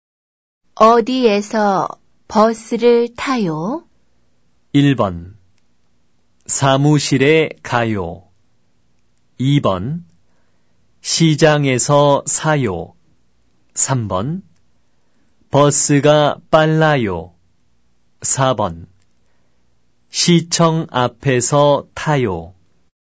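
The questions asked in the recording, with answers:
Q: 어디에서 버스를 타요?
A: 4: 시청 앞에서 타요.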